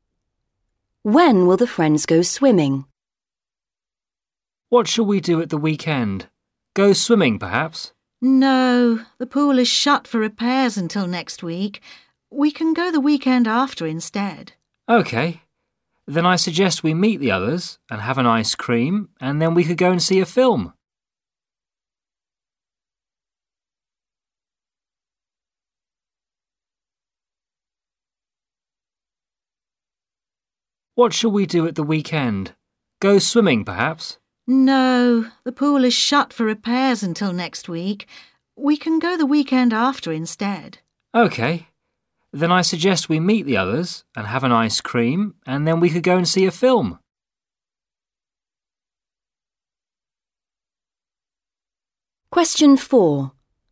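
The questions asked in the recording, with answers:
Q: When will the friends go swimming?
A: The weekend after next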